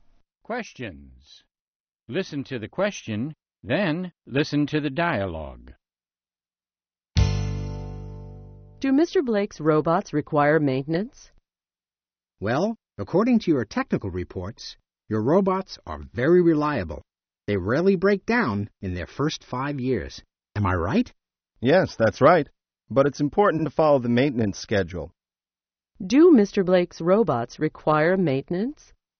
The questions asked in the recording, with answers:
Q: Do Mr. Blake's robots require maintenance?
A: Yes, they do. It's important to follow the maintenance schedule.